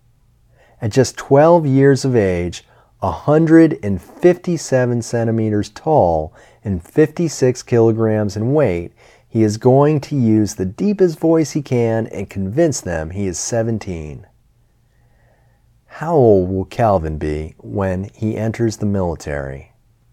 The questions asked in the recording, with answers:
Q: How old will Calvin be when he enters the military?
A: Calvin will be just 12 years old when he enters the military.